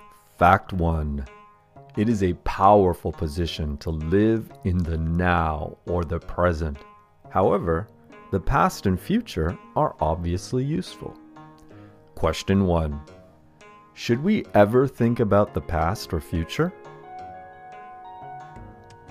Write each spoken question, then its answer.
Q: Should we ever think about the past or future?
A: Yes, we should think about the past and the future as long as it is useful.